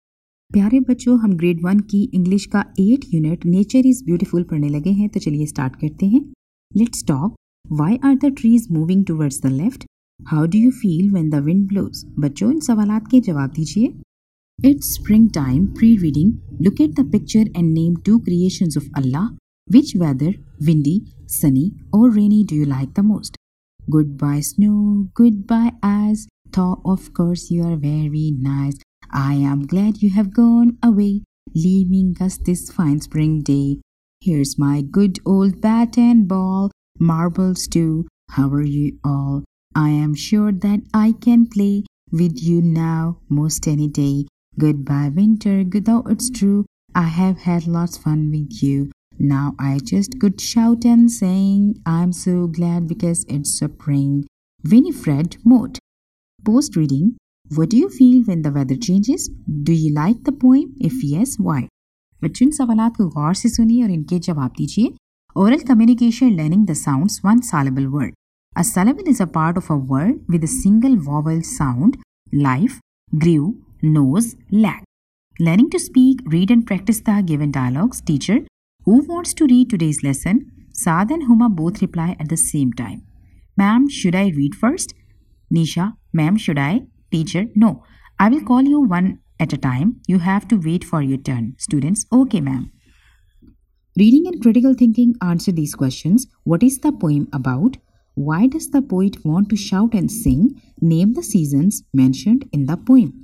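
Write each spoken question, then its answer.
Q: What is the poem about?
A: Saying goodbye to winter and welcoming spring

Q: Why does the poet want to shout and sing?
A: Because it's spring and he is glad

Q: Name the seasons mentioned in the poem.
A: Winter and spring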